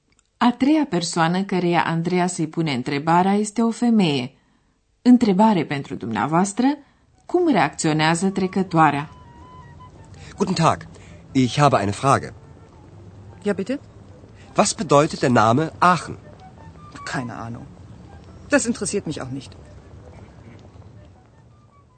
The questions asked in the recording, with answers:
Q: Întrebare pentru dumneavoastră, cum reacționează trecătoarea?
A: Trecătoarea spune, n-am idee.